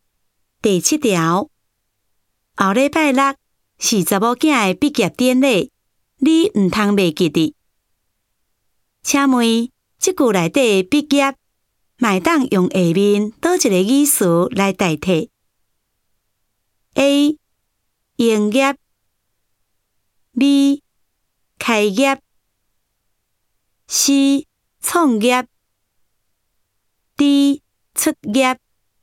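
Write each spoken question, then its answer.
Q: 请问,即句内底毕业,麦当用下面倒一个语词来代替?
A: D: 出业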